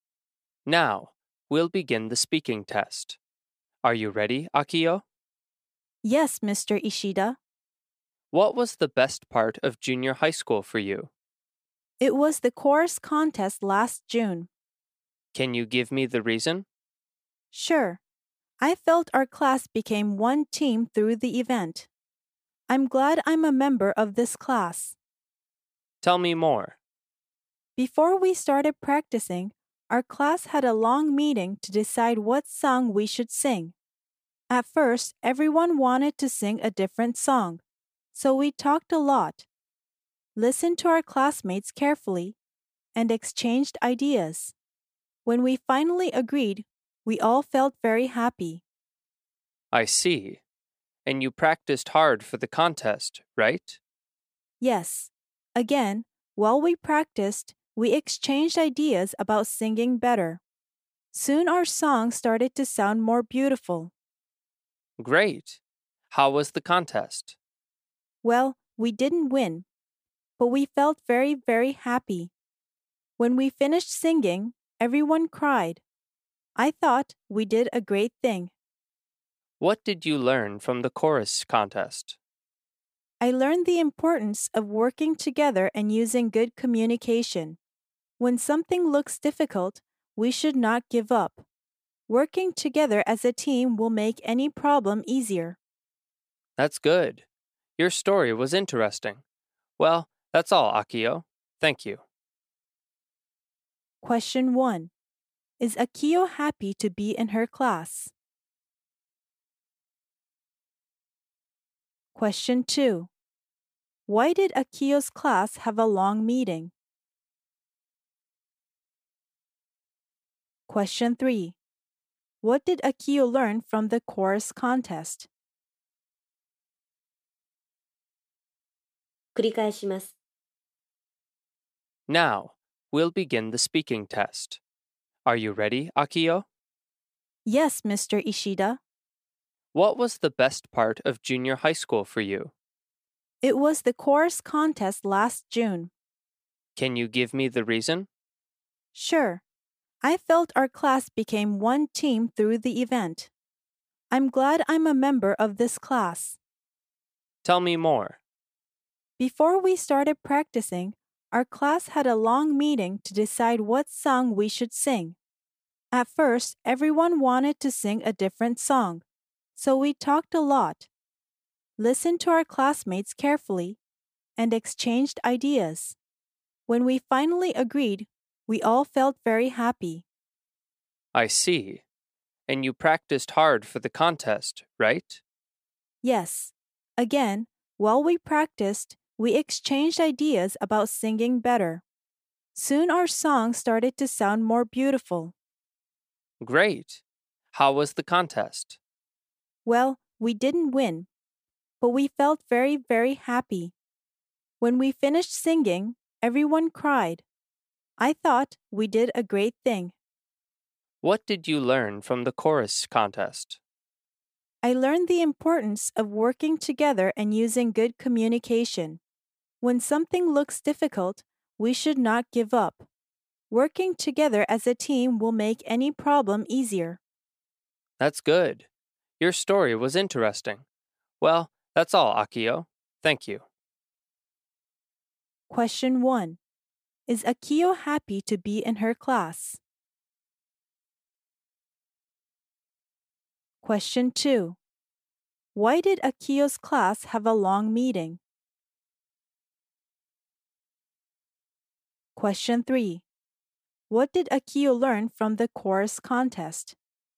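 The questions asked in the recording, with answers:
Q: Is Akio happy to be in her class?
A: Yes, she is.

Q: Why did Akio's class have a long meeting?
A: To decide what song they should sing.

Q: What did Akio learn from the chorus contest?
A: The importance of working together and using good communication.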